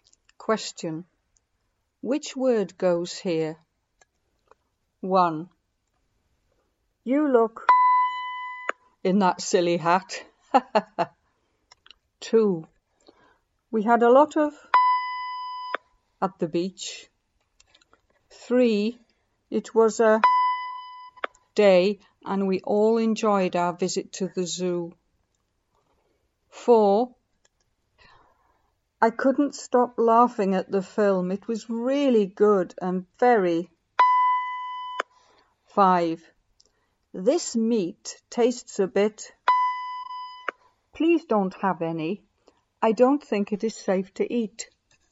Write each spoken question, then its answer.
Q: You look in that silly hat.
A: 1. You look funny in that silly hat.

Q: We had a lot of at the beach.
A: 2. We had a lot of fun at the beach.

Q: It was a day and we all enjoyed our visit to the zoo.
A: 3. It was a fun day and we all enjoyed our visit to the zoo.

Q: I couldn't stop laughing at the film. It was really good and very.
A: It was a really good comedy and very funny.

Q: This meat tastes a bit. Please don't have any.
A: 5. This meat tastes a bit funny.